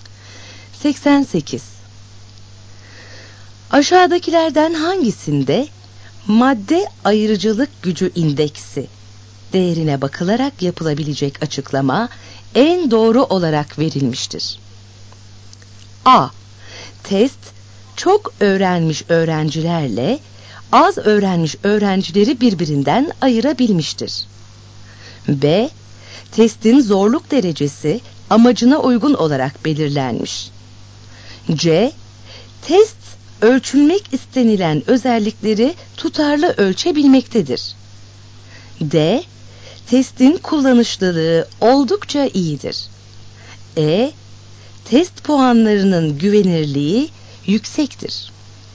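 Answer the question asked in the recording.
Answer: A: Test çok öğrenmiş öğrencilerle az öğrenmiş öğrencileri birbirinden ayırabilmiştir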